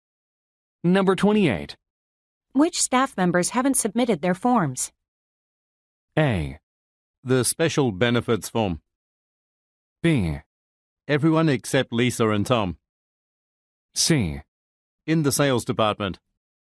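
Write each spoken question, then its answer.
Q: Which staff members haven't submitted their forms?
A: B: Everyone except Lisa and Tom.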